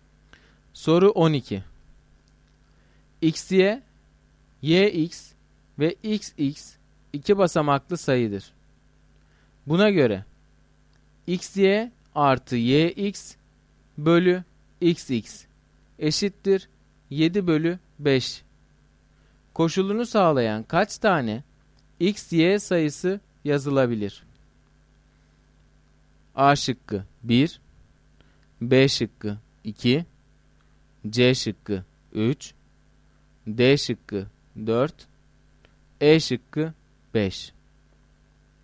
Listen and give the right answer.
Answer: Doğru cevap A şıkkı.